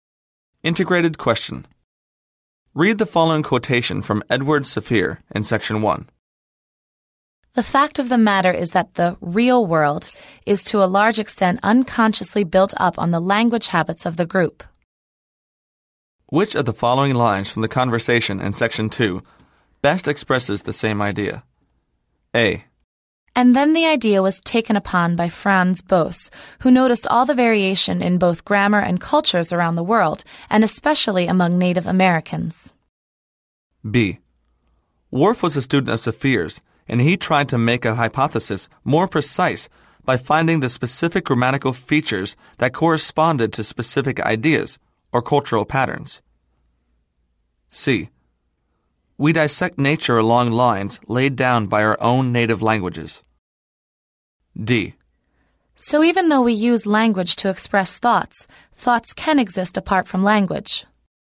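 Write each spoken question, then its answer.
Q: Which of the following lines from the conversation in section 2 best expresses the same idea?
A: C: We dissect nature along lines laid down by our own native languages.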